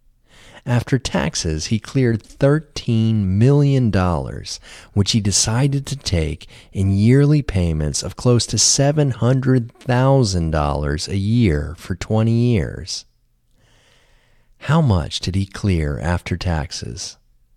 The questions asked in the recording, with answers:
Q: How much did he clear after taxes?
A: He cleared $13 million after taxes.